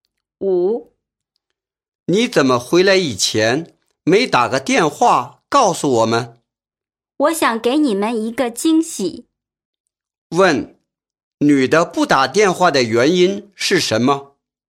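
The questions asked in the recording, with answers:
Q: 女的不打电话的原因是什么?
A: 想给他们一个惊喜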